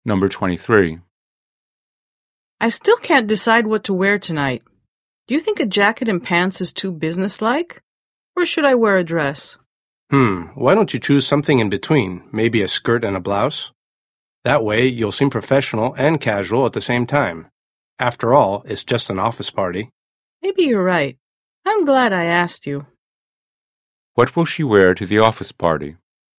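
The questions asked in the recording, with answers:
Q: What will she wear to the office party?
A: A skirt and a blouse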